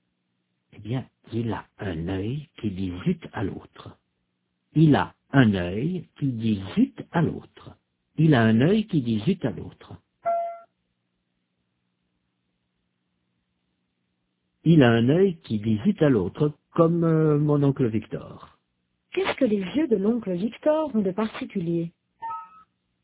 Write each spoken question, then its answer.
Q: Qu'est-ce que les yeux de l'oncle Victor ont de particulier?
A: Il a un œil qui dit zut à l'autre.